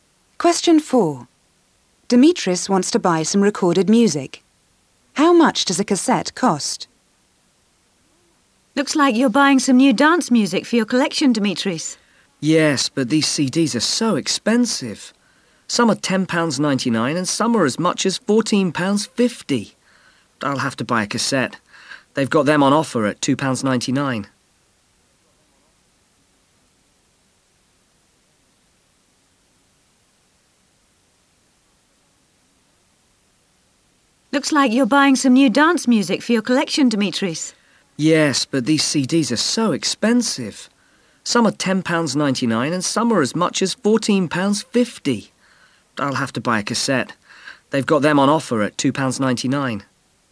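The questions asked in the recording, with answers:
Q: How much does a cassette cost?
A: £2.99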